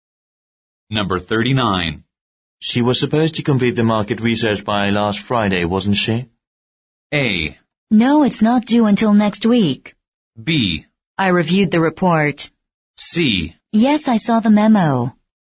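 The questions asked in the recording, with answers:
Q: She was supposed to complete the market research by last Friday, wasn't she?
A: A: No, it's not due until next week.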